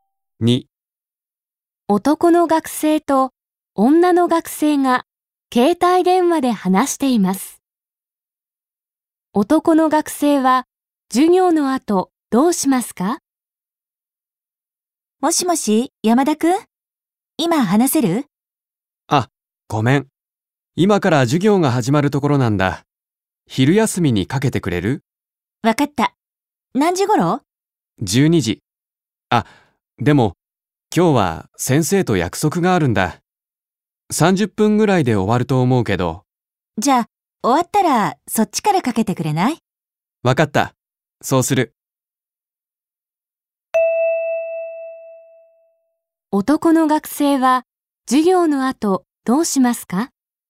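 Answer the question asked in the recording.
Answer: 先生と会って(約束)、終わったら女の学生に電話をかける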